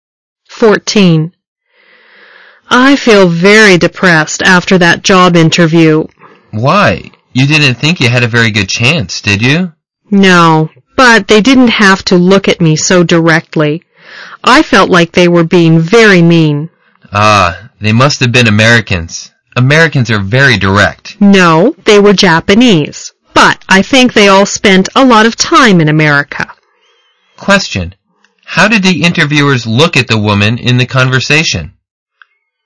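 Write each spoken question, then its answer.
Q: How did the interviewers look at the woman in the conversation?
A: Very directly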